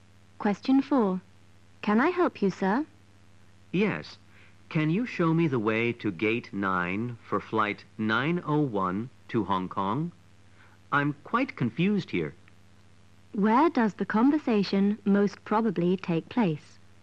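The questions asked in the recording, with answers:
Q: Where does the conversation most probably take place?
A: At an airport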